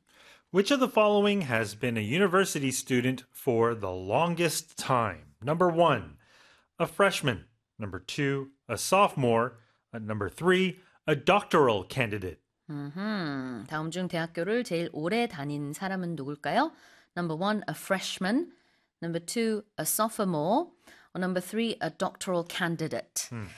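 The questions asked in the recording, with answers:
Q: Which of the following has been a university student for the longest time?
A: 3: a doctoral candidate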